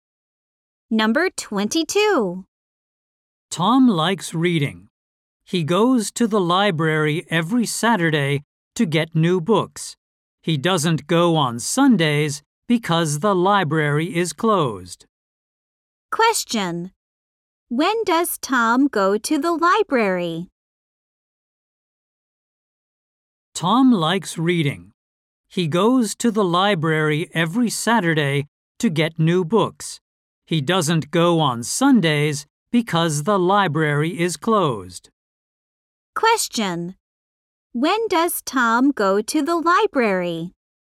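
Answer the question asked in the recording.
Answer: Every Saturday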